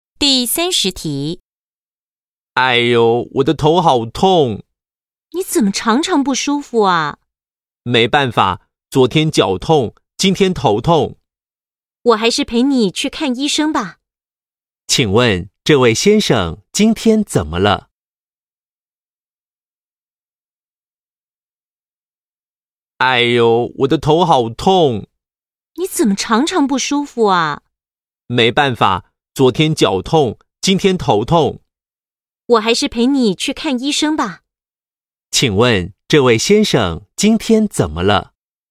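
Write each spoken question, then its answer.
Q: 请问这位先生今天怎么了?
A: 头痛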